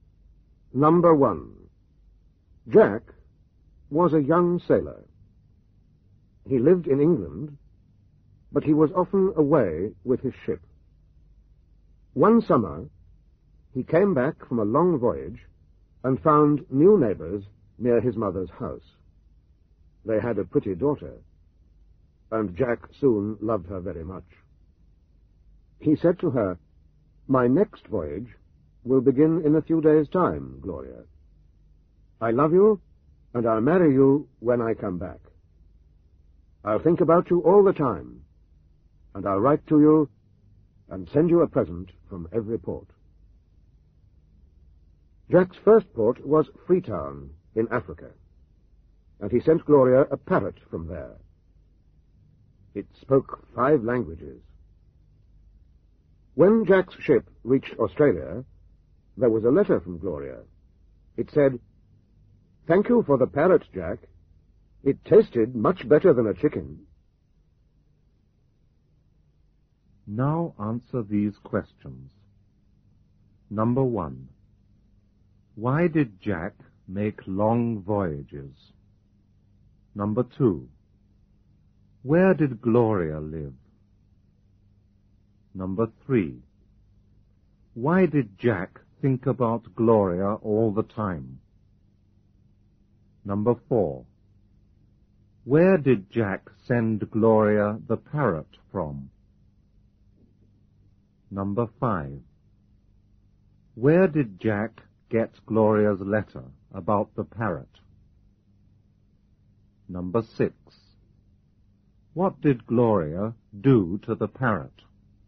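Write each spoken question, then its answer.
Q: Why did Jack make long voyages?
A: Because he was a sailor.

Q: Where did Gloria live?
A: Near Jack's mother's house in England.

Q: Why did Jack think about Gloria all the time?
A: Because he loved her.

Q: Where did Jack send Gloria the parrot from?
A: From Freetown in Africa.

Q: Where did Jack get Gloria's letter about the parrot?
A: In Australia.

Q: What did Gloria do to the parrot?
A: She ate it.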